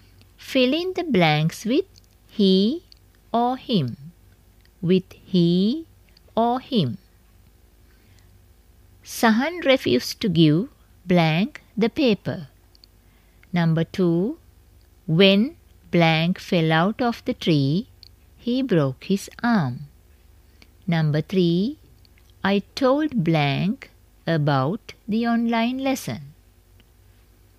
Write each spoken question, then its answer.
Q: Sahan refused to give blank the paper.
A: Sahan refused to give him the paper.

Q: When blank fell out of the tree, he broke his arm.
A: When he fell out of the tree, he broke his arm.

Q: I told blank about the online lesson.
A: I told him about the online lesson.